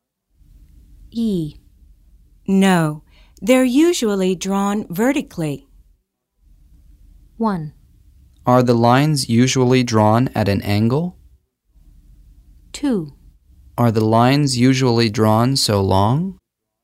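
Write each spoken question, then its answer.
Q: No, they're usually drawn vertically.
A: 1: Are the lines usually drawn at an angle?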